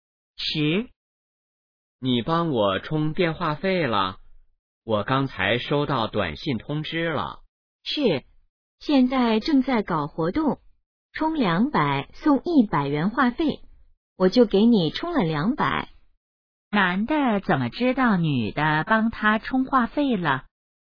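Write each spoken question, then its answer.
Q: 男的怎么知道女的帮他充话费了?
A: 收到了短信通知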